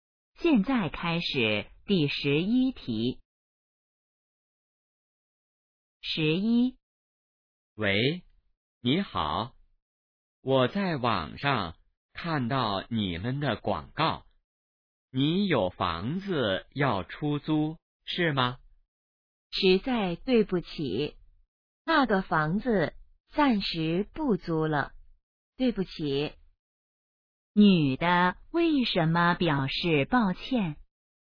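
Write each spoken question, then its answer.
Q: 女的为什么表示抱歉?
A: 房子暂时不租了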